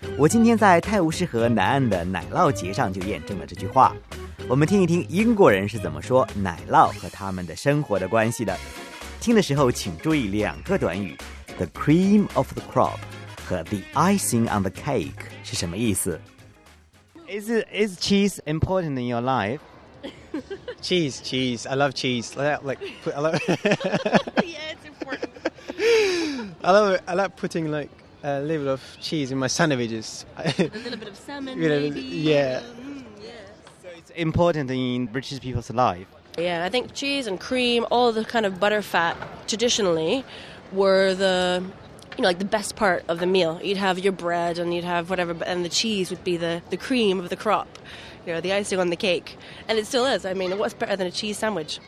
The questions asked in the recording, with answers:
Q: 听的时候请注意两个短语 ,the cream of the crop 和 the icing on the cake 是什么意思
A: 精华中的精华。The icing on the cake.